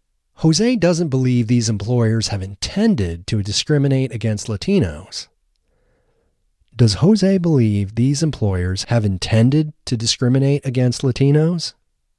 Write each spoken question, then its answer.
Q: Does Jose believe these employers have intended to discriminate against Latinos?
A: No, Jose doesn't believe these employers have intended to discriminate against Latinos.